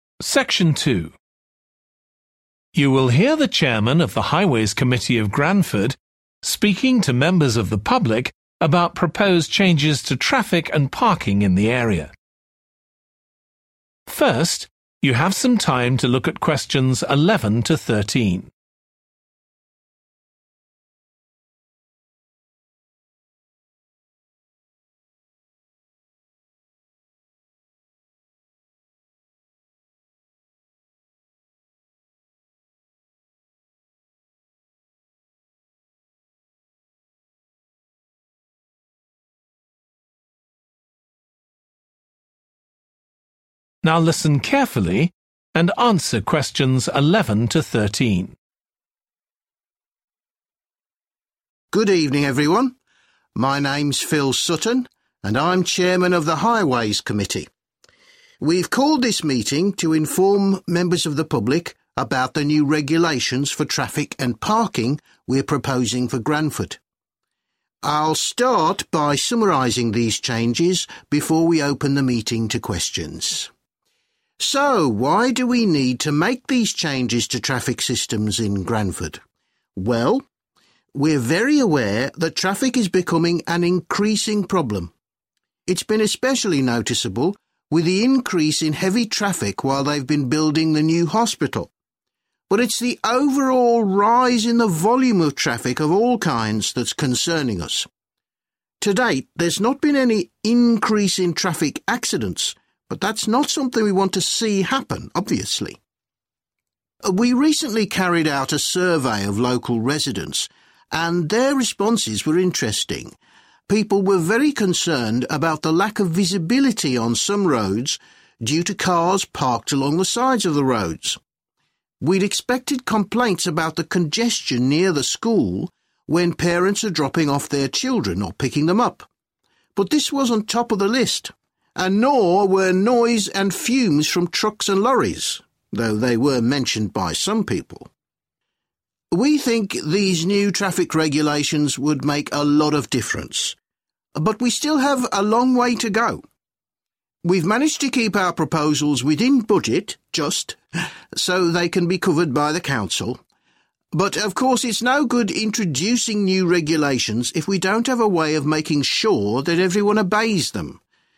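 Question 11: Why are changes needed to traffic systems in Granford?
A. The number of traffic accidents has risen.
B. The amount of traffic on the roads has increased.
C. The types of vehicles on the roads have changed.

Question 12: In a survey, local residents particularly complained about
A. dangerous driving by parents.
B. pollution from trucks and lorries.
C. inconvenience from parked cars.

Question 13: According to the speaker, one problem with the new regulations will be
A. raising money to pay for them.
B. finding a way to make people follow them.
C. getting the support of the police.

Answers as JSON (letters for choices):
{"11": "B", "12": "C", "13": "B"}

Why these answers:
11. But it's the overall rise in the volume of traffic of all kinds that's concerning us [Nhưng chính sự gia tăng tổng thể về lượng tham gia giao thông của mọi loại phương tiện mới là điều khiến chúng tôi lo lắng]
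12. People were very concerned about the lack of visibility on some roads due to cars parked along the sides of the roads [Người dân rất bức xúc trước tình trạng một số tuyến đường bị che khuất tầm nhìn do ô tô đậu dọc hai bên đường]
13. But, of course, it's no good introducing new regulations if we don't have a way of making sure that everyone obeys them [Nhưng tất nhiên sẽ không tốt khi đưa ra các quy định mới nếu chúng ta không có cách đảm bảo rằng mọi người đều tuân theo chúng]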